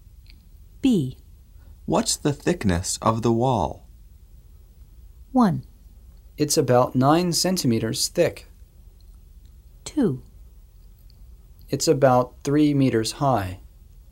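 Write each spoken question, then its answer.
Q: What's the thickness of the wall?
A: 1: It's about 9 centimeters thick.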